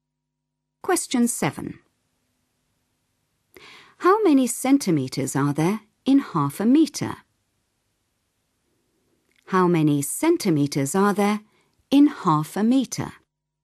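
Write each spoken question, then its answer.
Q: How many centimetres are there in 0.5 metre?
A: 50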